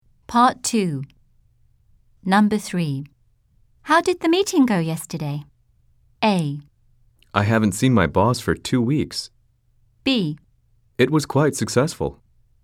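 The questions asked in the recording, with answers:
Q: How did the meeting go yesterday?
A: B: It was quite successful.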